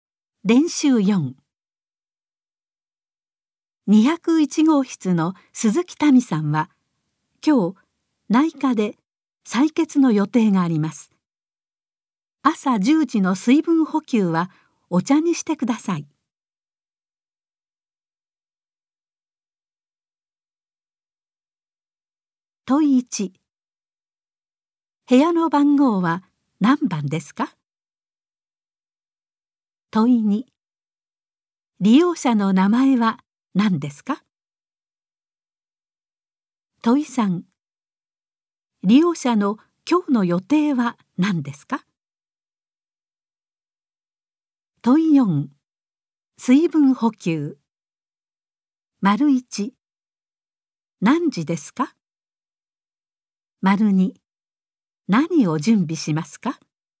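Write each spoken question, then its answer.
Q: 部屋の番号は何番ですか?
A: 201号室

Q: 利用者の名前は何ですか?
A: 鈴木民さん

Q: 利用者の今日の予定は何ですか?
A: 内科で採血

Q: 水分補給。1。何時ですか?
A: 朝10時

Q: 2。何を準備しますか?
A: お茶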